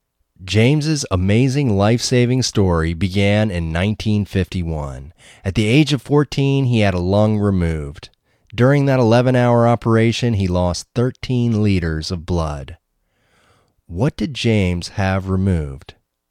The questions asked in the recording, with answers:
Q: What did James have removed?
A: James had a lung removed.